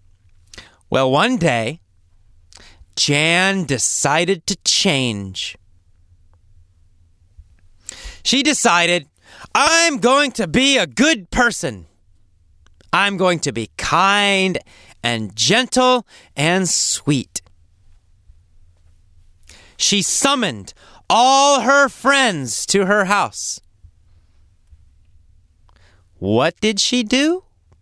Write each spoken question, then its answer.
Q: What did she do?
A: She summoned her friends to her house.